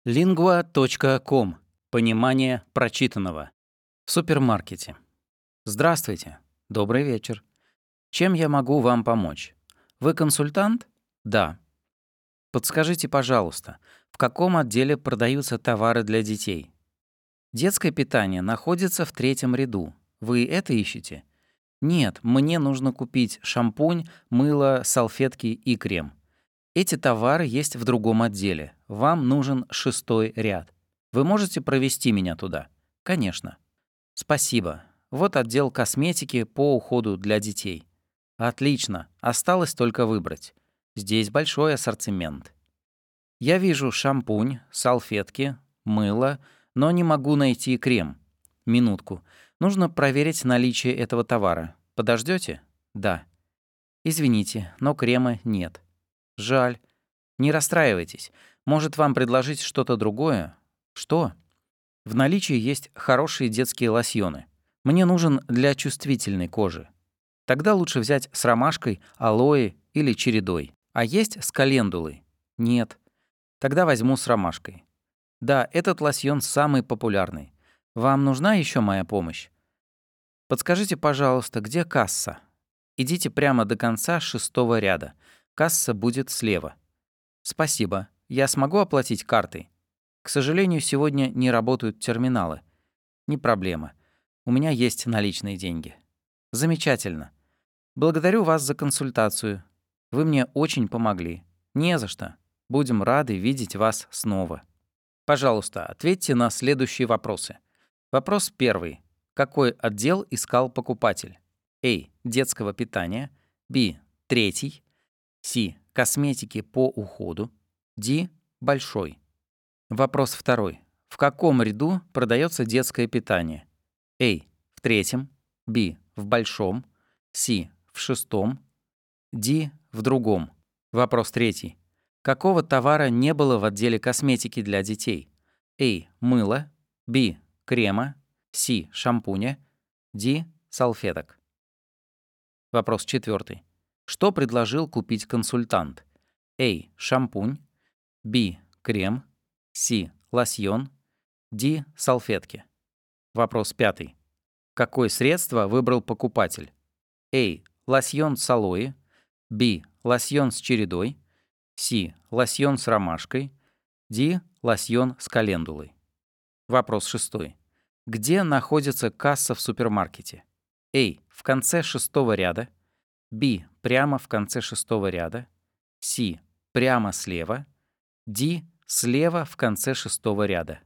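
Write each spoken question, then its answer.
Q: Какой отдел искал покупатель?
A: С: Косметики по уходу

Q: В каком ряду продается детское питание?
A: А: В третьем

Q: Какого товара не было в отделе косметики для детей?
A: Б: Крема

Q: Что предложил купить консультант?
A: С: Лосьон

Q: Какое средство выбрал покупатель?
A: С: Лосьон с ромашкой

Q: Где находится касса в супермаркете?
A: Д: Слева в конце шестого ряда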